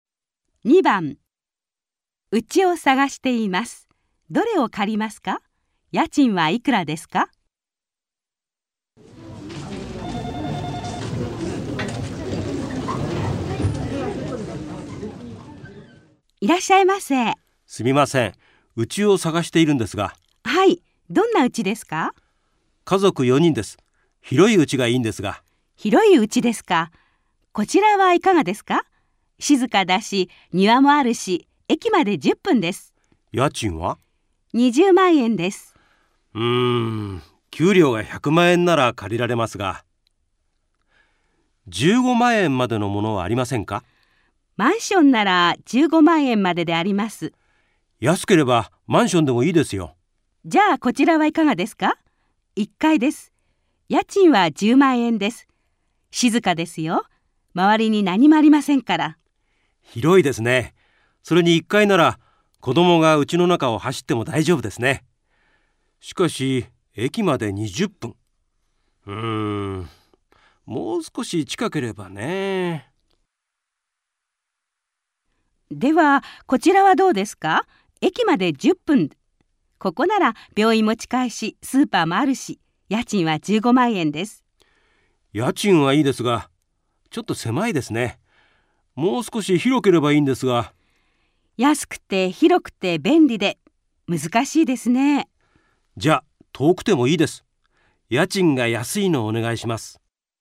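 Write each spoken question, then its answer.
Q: どれを借りますか?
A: 駅まで20分の1階のマンション

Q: 家賃はいくらですか?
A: 10万円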